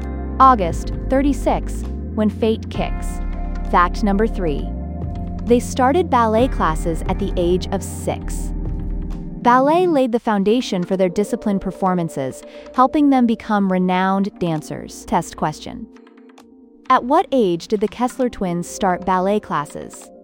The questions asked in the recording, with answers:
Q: At what age did the Kessler twins start ballet classes?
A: Correct answer. 6.